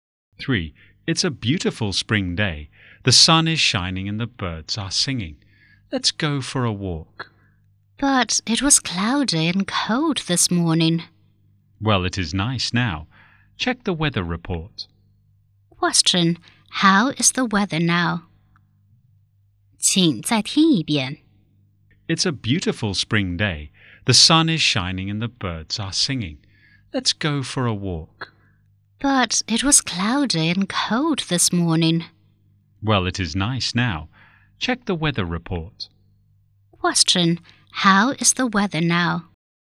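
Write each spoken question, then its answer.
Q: Question,How is the weather now?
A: Sunny and nice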